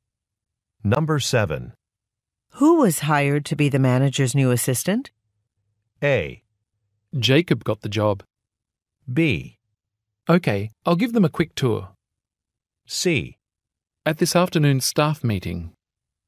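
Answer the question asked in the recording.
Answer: A: Jacob got the job.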